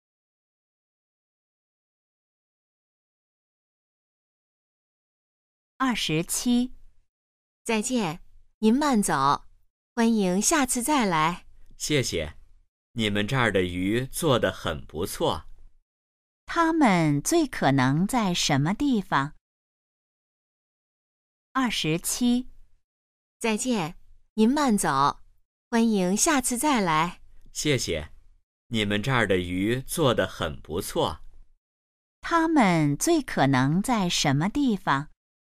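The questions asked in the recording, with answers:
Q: 他们最可能在什么地方?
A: 饭馆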